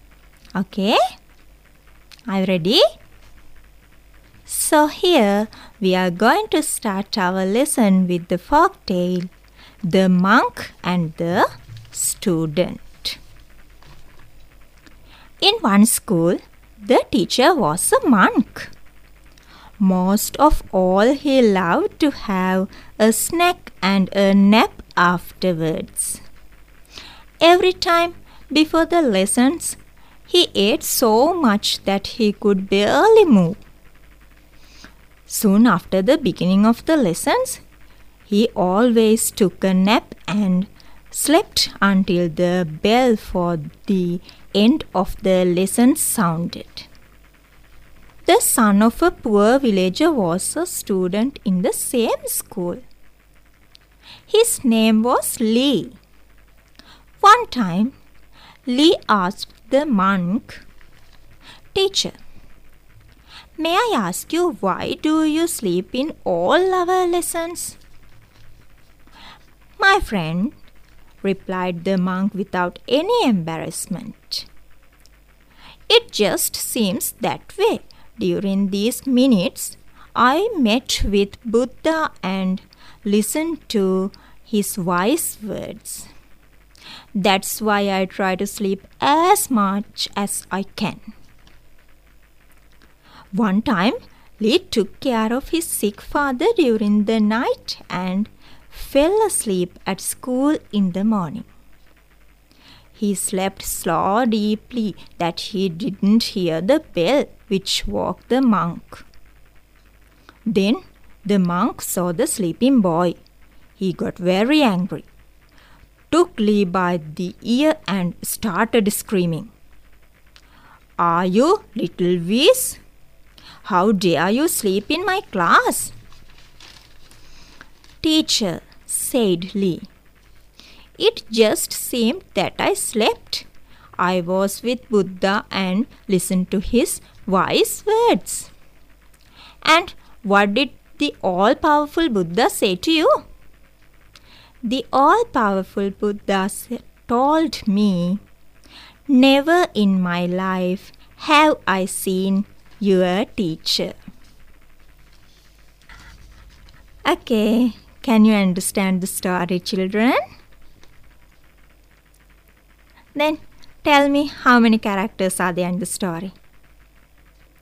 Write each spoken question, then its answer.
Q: Then tell me, how many characters are there in the story?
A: Yes, there were only two characters.